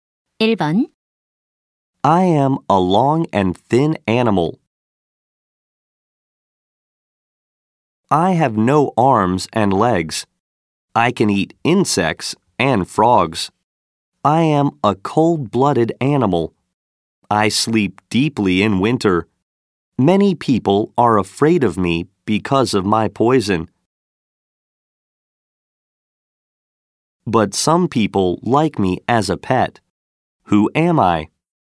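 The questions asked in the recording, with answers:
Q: Who am I?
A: A snake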